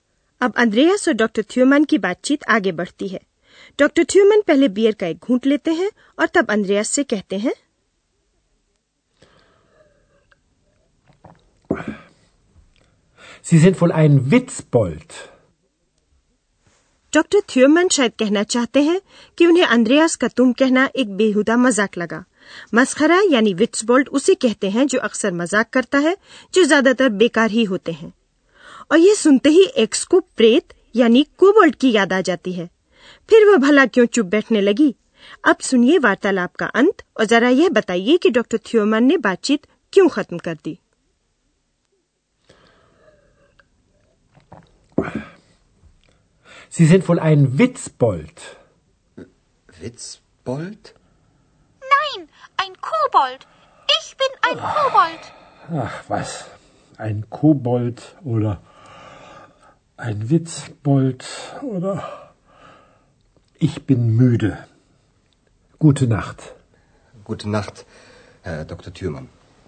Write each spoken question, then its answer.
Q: जरा यह बताइए कि doctor थ्योमन ने बातचीत क्यों खत्म कर दी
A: तो doctor थ्योमन बातचीत इसलिए खत्म करते हैं क्योंकि वे थके हुए हैं müde.